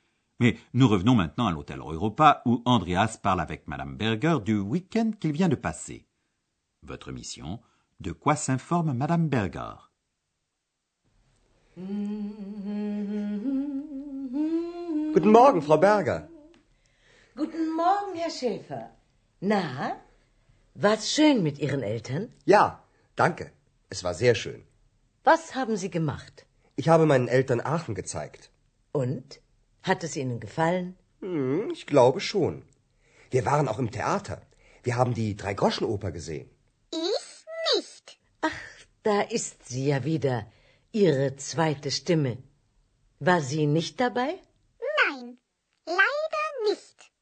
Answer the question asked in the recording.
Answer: Madame Berger demande ce que Andreas a fait avec ses parents et si Aix-la-Chapelle leur a plu.